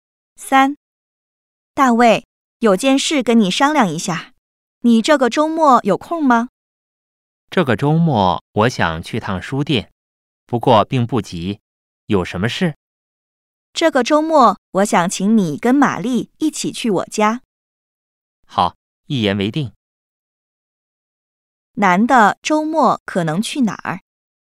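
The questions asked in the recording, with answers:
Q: 男的周末可能去哪儿?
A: 女的家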